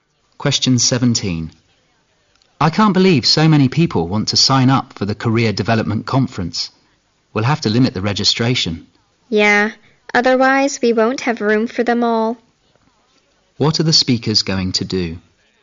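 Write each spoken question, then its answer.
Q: What are the speakers going to do?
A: Limit registration for the conference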